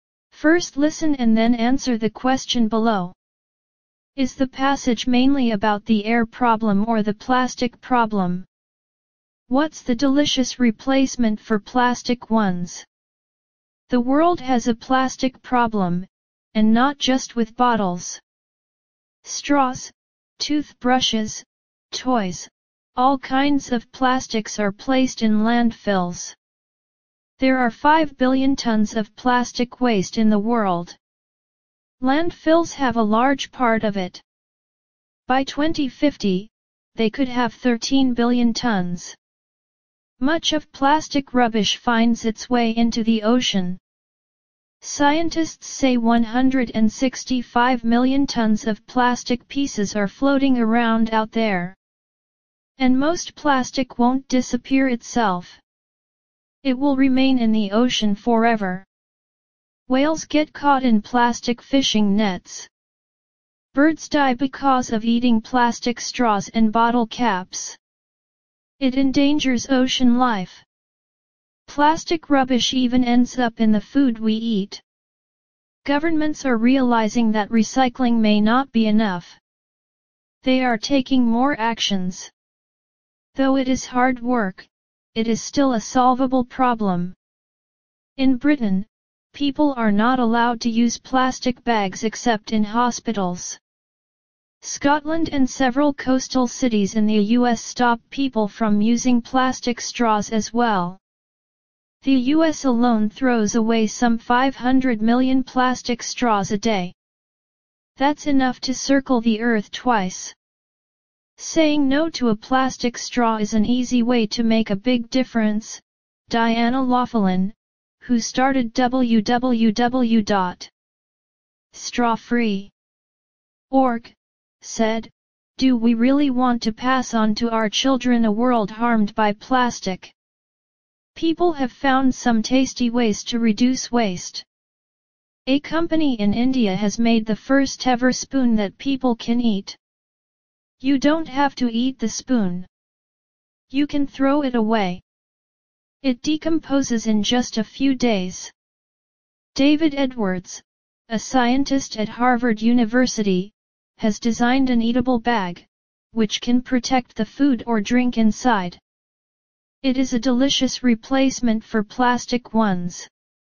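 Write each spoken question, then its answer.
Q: Is the passage mainly about the air problem or the plastic problem?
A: The plastic problem

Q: What's the delicious replacement for plastic ones?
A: An eatable bag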